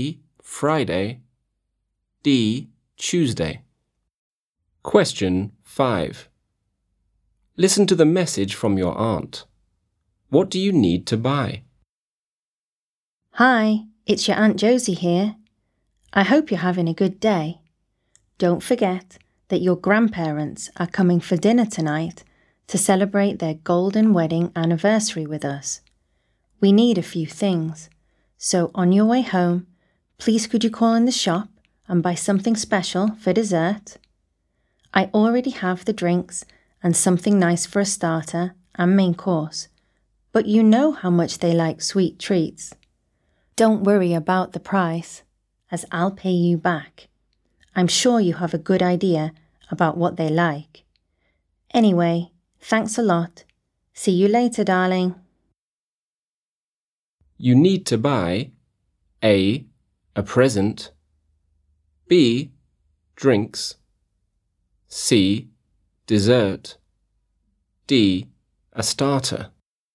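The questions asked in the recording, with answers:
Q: What do you need to buy?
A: C: dessert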